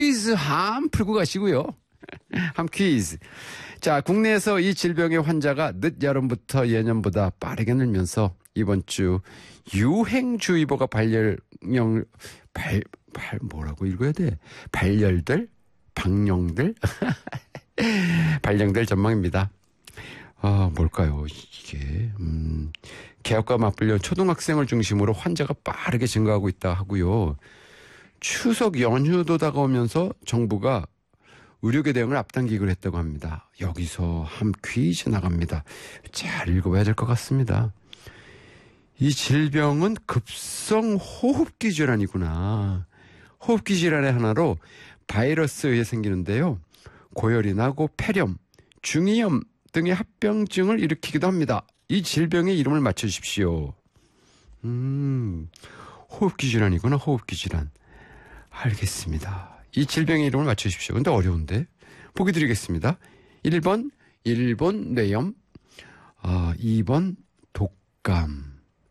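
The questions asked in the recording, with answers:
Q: 이 질병의 이름을 맞춰주십시오.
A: 2: 독감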